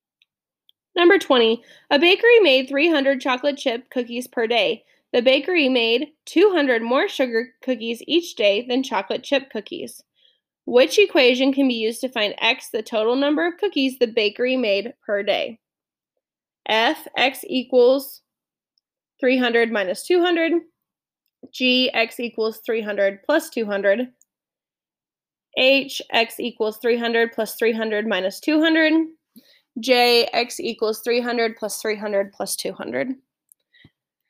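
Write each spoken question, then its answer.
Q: Which equation can be used to find x, the total number of cookies the bakery made per day?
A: J: x equals 300 plus 300 plus 200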